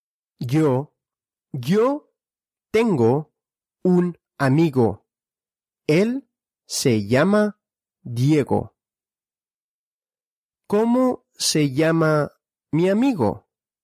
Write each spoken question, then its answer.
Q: ¿Cómo se llama mi amigo?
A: Diego. Él se llama Diego.